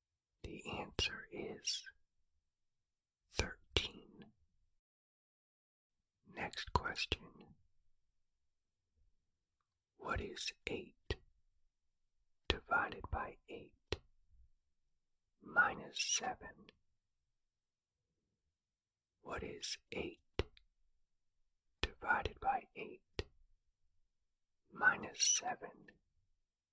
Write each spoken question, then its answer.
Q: What is 8 divided by 8 minus 7?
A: The answer is negative 6.